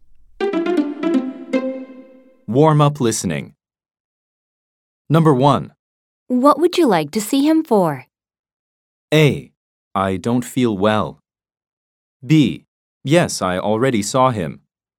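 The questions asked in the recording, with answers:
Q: What would you like to see him for?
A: A: I don't feel well.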